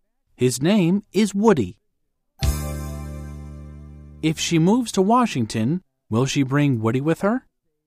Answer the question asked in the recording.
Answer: Yes, she will. She won't move to Washington without him.